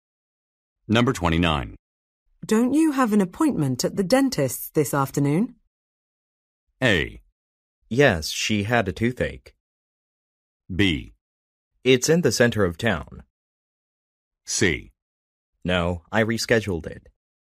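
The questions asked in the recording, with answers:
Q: Don't you have an appointment at the dentist's this afternoon?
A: C: No, I rescheduled it.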